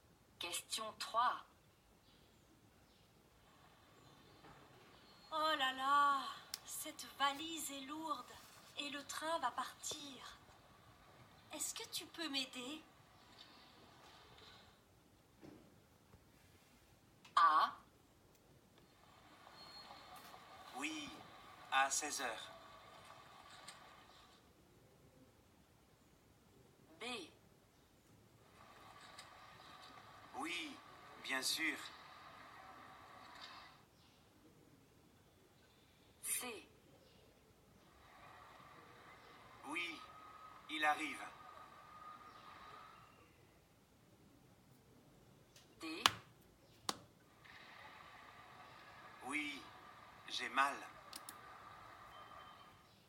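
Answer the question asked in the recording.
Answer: B: Oui, bien sûr.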